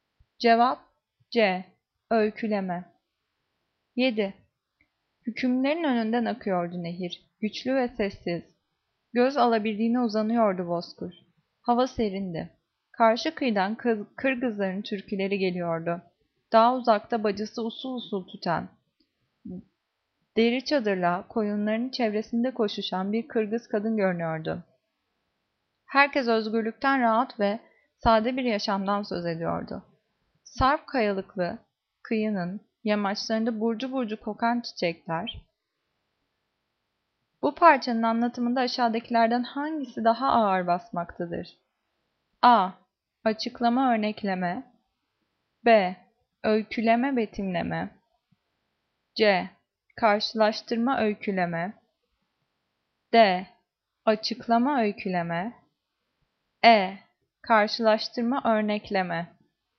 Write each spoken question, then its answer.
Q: Bu parçanın anlatımında aşağıdakilerden hangisi daha ağır basmaktadır?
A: Cevap B. Öyküleme, betimleme.